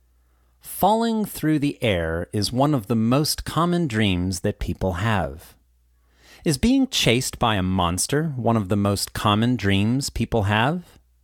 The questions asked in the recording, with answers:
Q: Is being chased by a monster one of the most common dreams people have?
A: No. Falling through the air is one of the most common dreams people have.